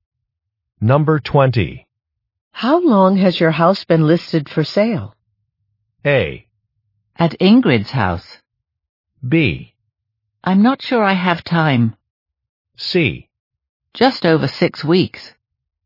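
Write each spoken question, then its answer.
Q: How long has your house been listed for sale?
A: C: Just over 6 weeks.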